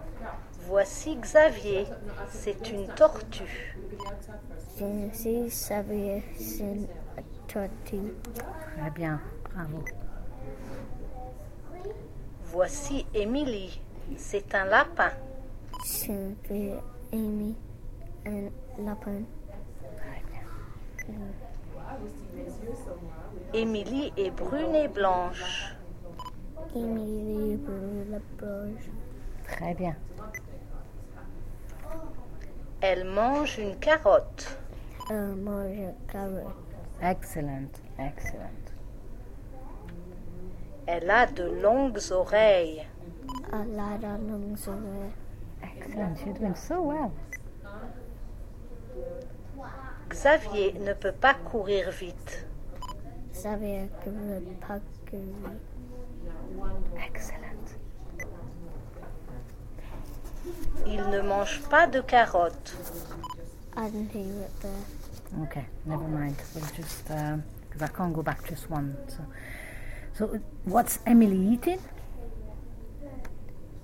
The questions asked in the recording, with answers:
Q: So what's Emily eating?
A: Carrot, yeah.